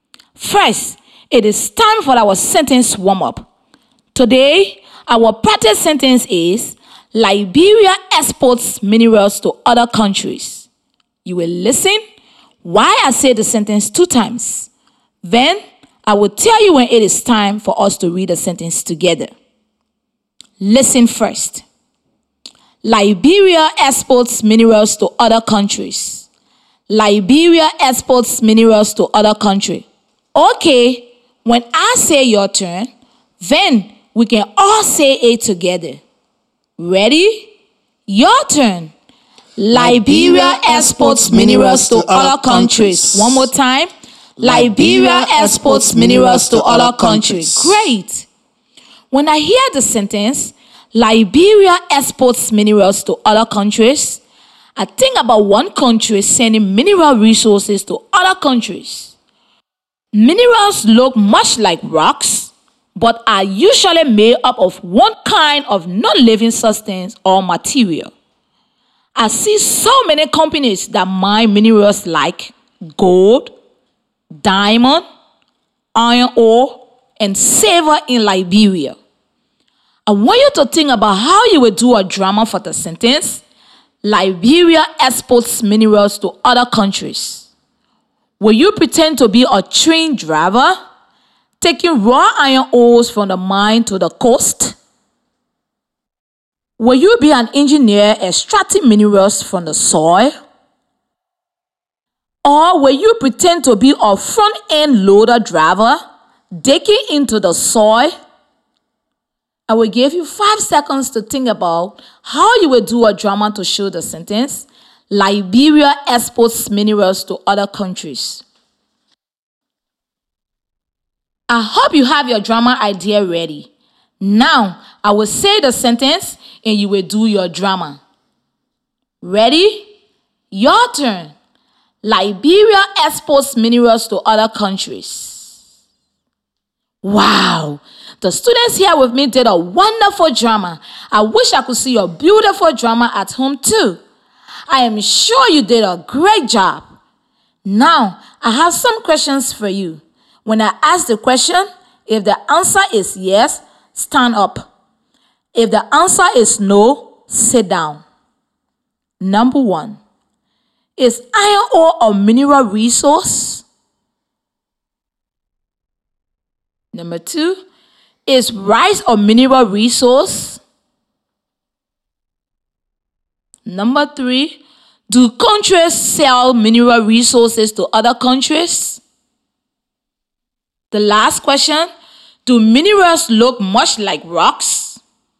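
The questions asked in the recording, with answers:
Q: Number one, is iron ore a mineral resource?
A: Yes

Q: Number two, is rice a mineral resource?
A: No

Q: Number three, do countries sell mineral resources to other countries?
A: Yes

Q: The last question, do minerals look much like rocks?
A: Yes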